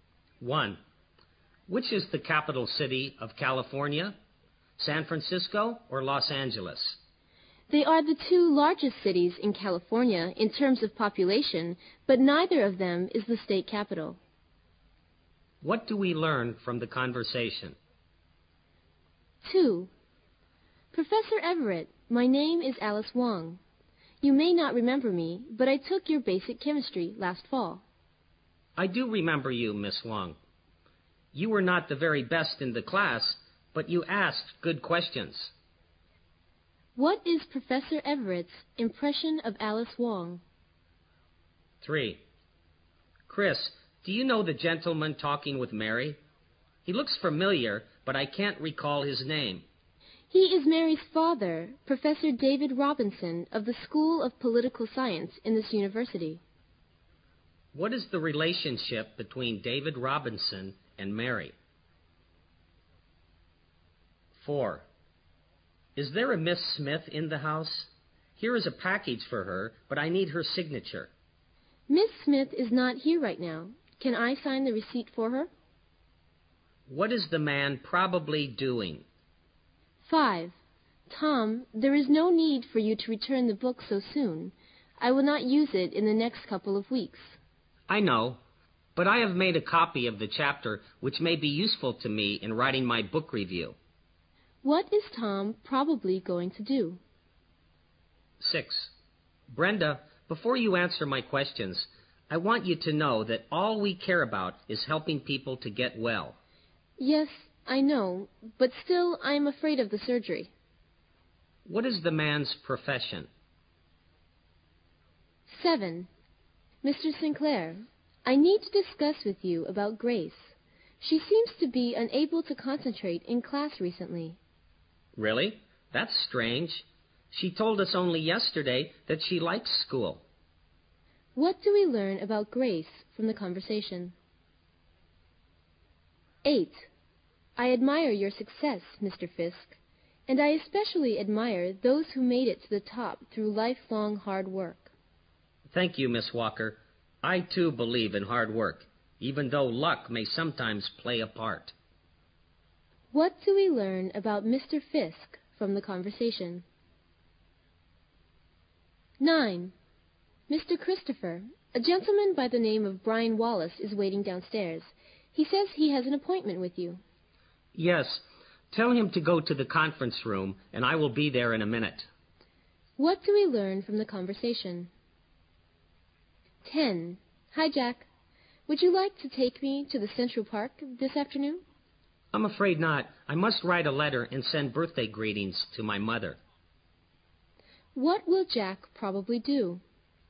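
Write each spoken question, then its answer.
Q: What do we learn from the conversation?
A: Neither San Francisco nor Los Angeles is California's capital

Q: What is Professor Everett's impression of Alice Wong?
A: She was not the best student but asked good questions

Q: What is the relationship between David Robinson and Mary?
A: He is Mary's father

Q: What is the man probably doing?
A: Delivering a package

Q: What is Tom probably going to do?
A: Return the book

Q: What is the man's profession?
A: A doctor (surgeon)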